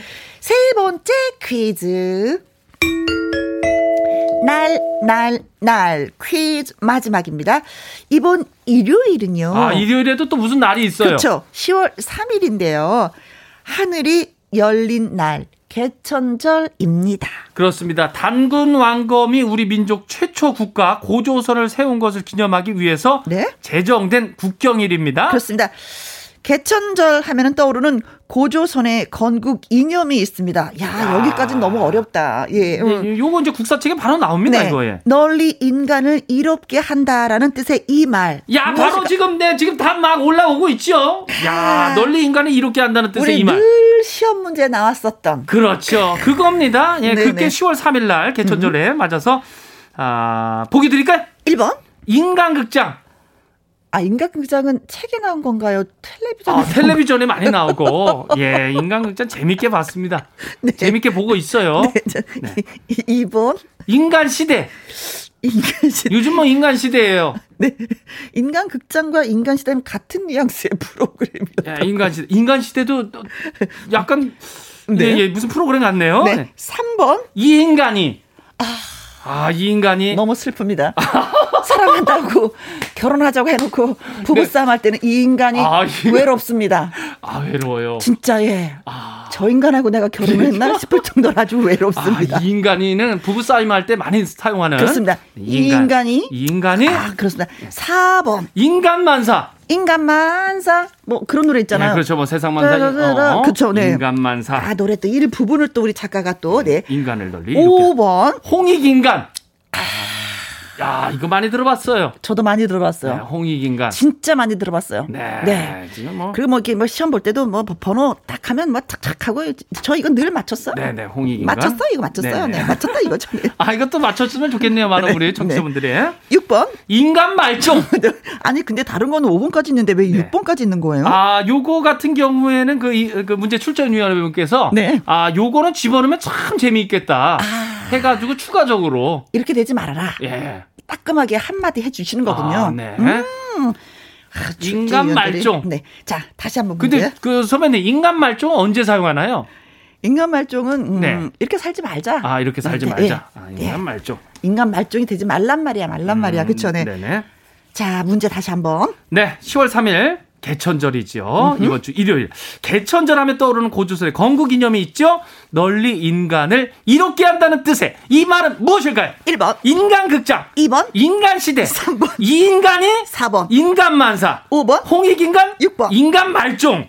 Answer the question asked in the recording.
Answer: 5번 홍익인간이 정답입니다.